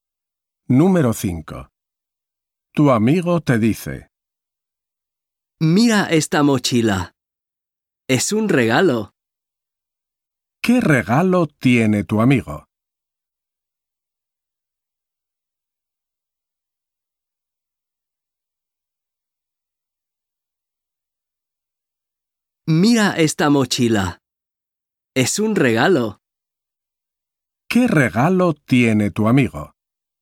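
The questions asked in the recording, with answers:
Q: ¿Qué regalo tiene tu amigo?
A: una mochila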